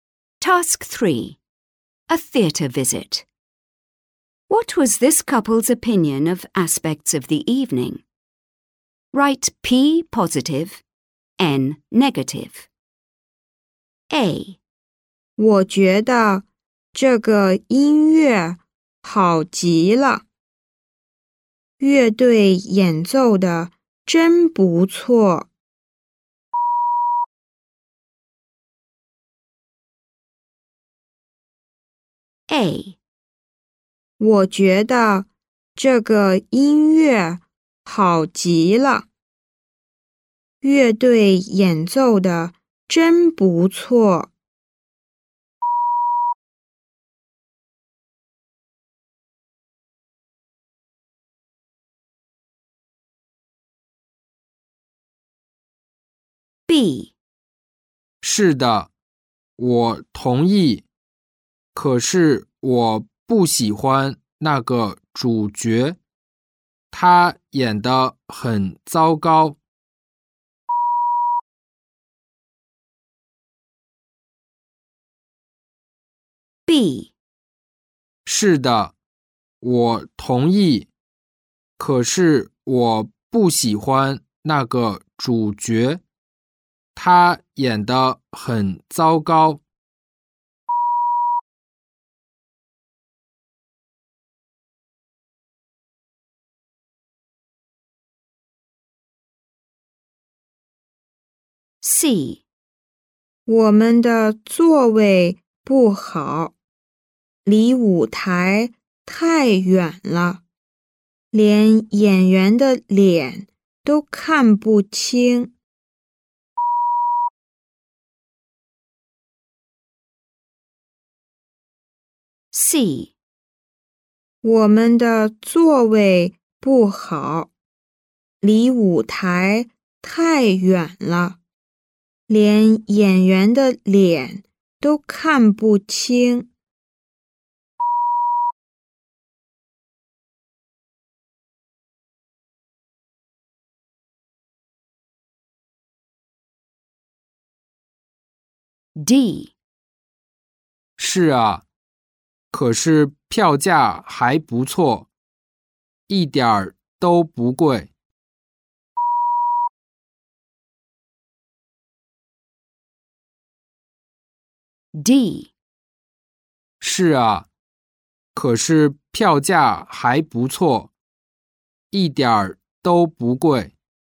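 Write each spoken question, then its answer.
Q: What was this couple's opinion of aspects of the evening?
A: P (positive): the music

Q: What was this couple's opinion of aspects of the evening?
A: N (negative): the main actor

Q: What was this couple's opinion of aspects of the evening?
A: N (negative): the seats

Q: What was this couple's opinion of aspects of the evening?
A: P (positive): the ticket price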